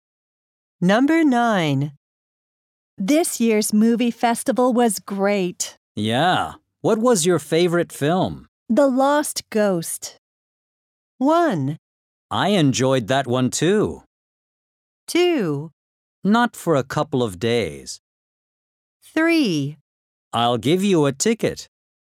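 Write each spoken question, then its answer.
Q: The Lost Ghost.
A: 1: I enjoyed that one too.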